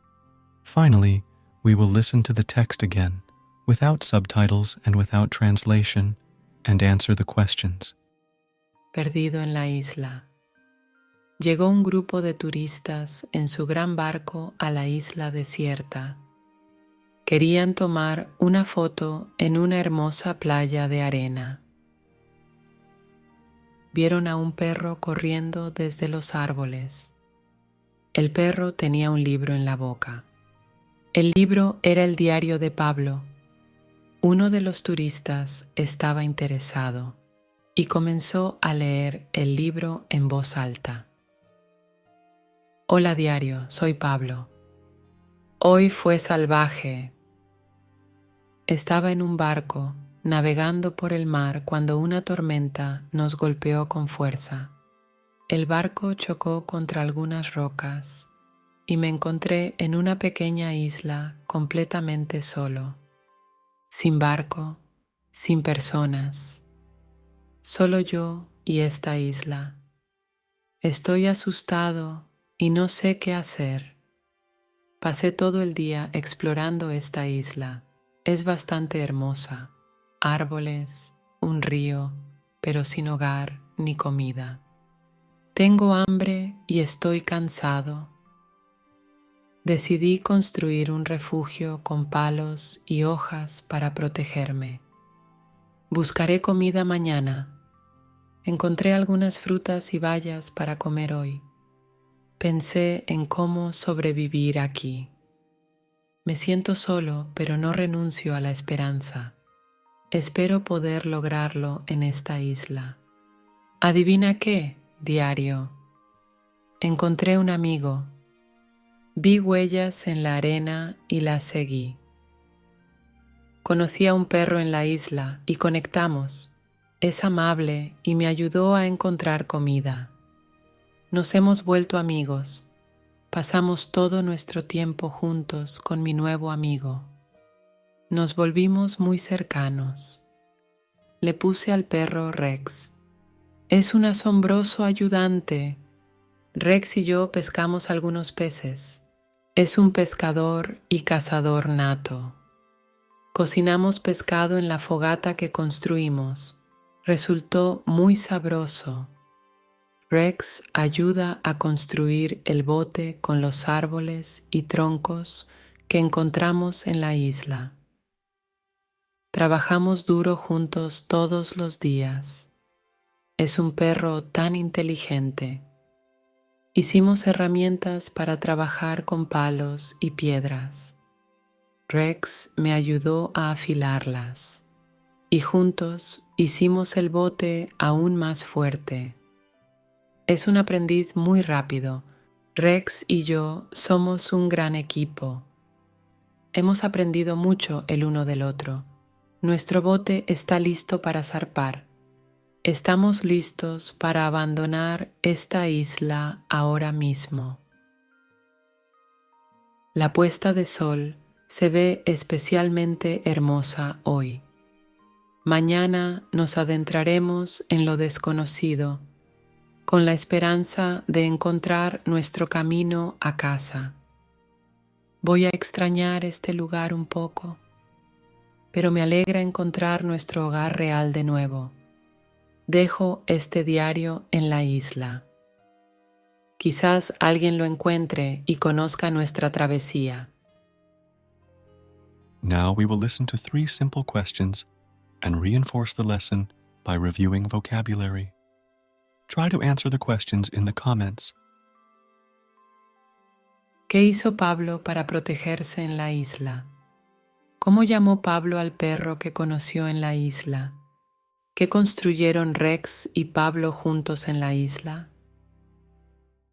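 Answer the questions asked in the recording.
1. Construyó un refugio con palos y hojas
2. Rex
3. Un bote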